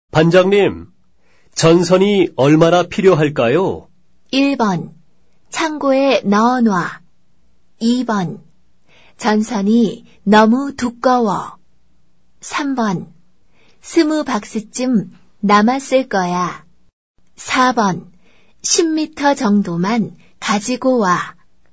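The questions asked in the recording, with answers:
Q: 반장님, 전선이 얼마나 필요할까요?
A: 4: 10미터 정도만 가지고 와.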